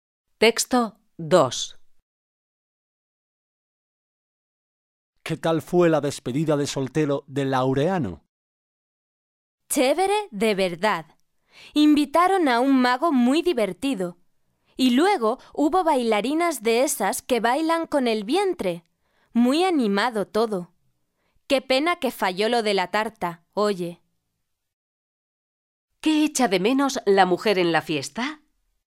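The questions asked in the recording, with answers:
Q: ¿Qué echa de menos la mujer en la fiesta?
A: La tarta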